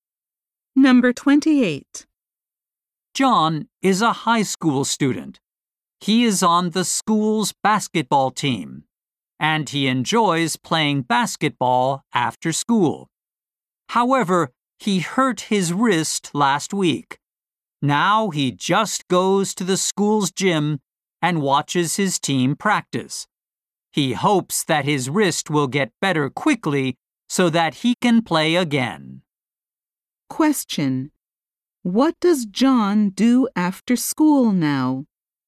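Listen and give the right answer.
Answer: He watches his team practice in the gym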